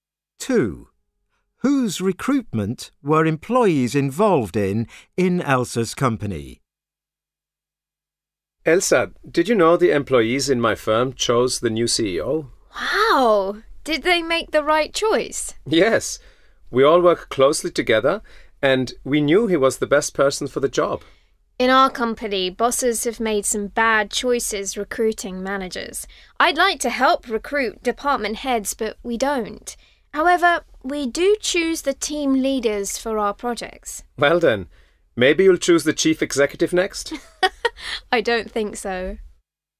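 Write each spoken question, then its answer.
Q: Whose recruitment were employees involved in Elsa's company?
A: Team leaders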